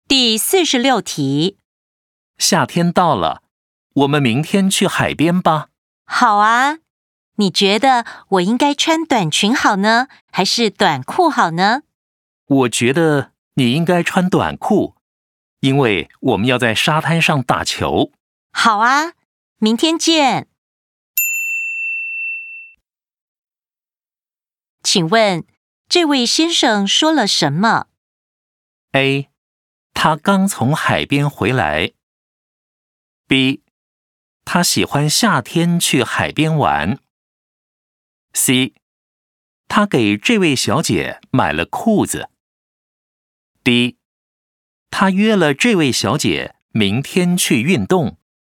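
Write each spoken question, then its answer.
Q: 请问,这位先生说了什么?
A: D: 他约了这位小姐明天去运动。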